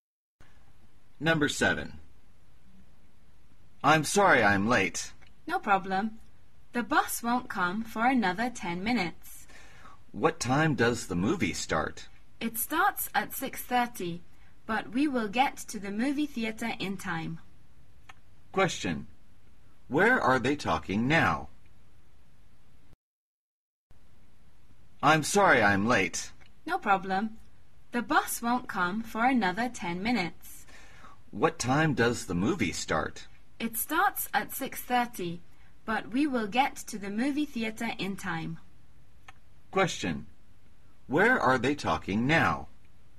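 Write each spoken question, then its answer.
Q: Where are they talking now?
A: At a bus stop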